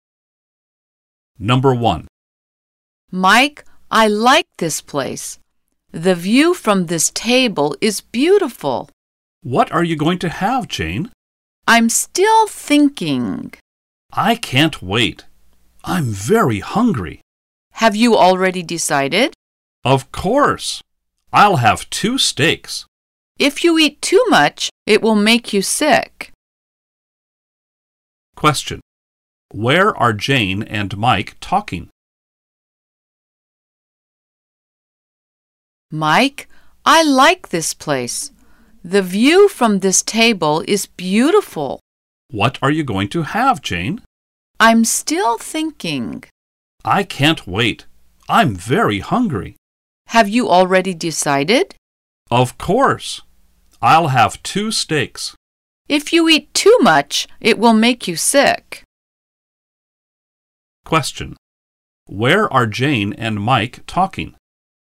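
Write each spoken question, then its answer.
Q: Where are Jane and Mike talking?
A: At a restaurant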